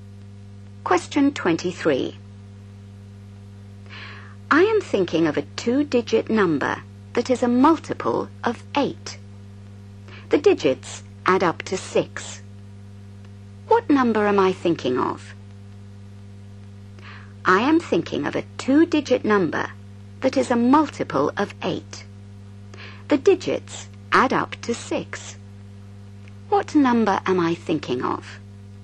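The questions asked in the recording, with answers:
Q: What number am I thinking of?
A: 24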